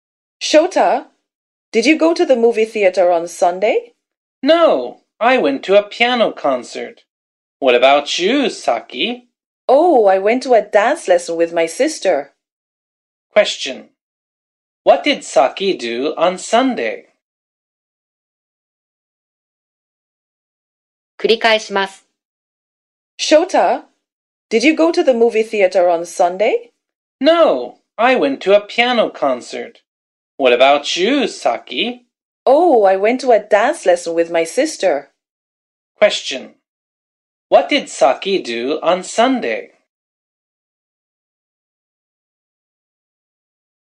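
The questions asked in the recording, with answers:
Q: What did Saki do on Sunday?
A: She went to a dance lesson with her sister.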